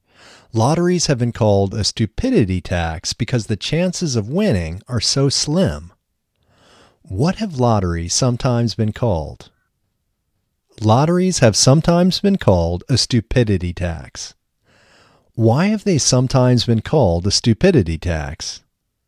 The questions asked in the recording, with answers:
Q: Why have they sometimes been called a stupidity tax?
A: They have sometimes been called a stupidity tax because the chances of winning are so slim.